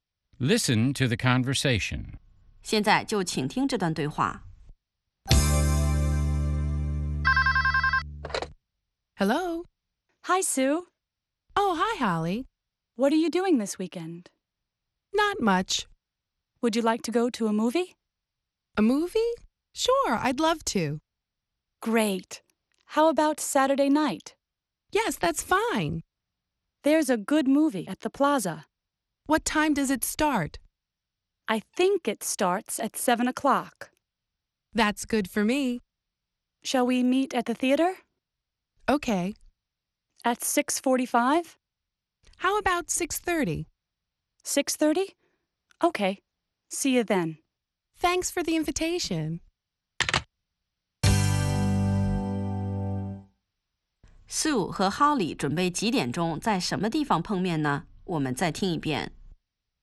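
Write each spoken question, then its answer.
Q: 苏和哈里准备几点钟在什么地方碰面呢?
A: 6:30在电影院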